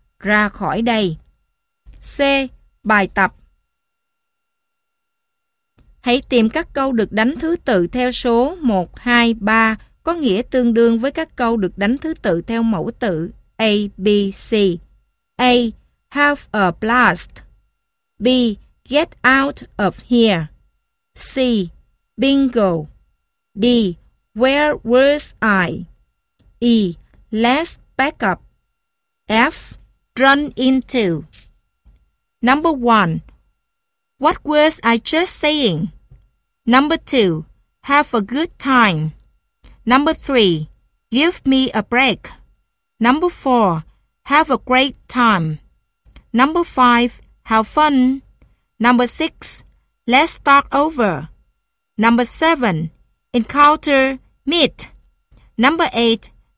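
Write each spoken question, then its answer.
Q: What words I just saying?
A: D: where was I?

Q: Have a good time.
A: A: have a blast

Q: Give me a break.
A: B: get out of here

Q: Have a great time.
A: A: have a blast

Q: Have fun.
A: A: have a blast

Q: Let's start over.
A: E: let's back up

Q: Encounter, meet.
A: F: run into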